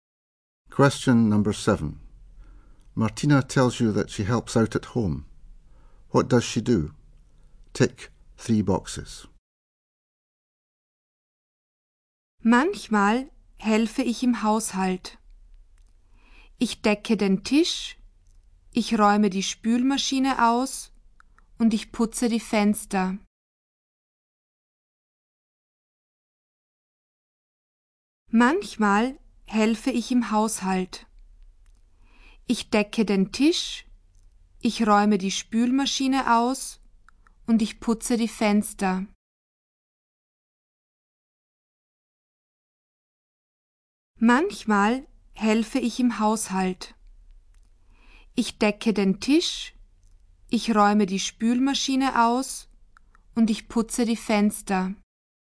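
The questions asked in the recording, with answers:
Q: What does she do?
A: Sets the table, empties the dishwasher, cleans the windows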